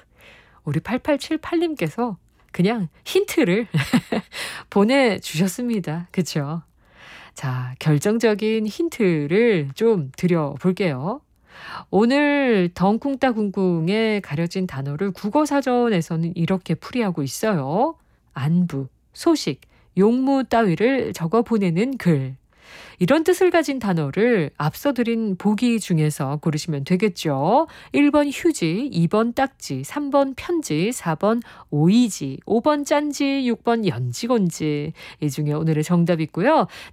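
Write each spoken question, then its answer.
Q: 안부, 소식, 용무 따위를 적어 보내는 글. 이런 뜻을 가진 단어를 앞서 드린 보기 중에서 고르시면 되겠죠.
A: 3: 편지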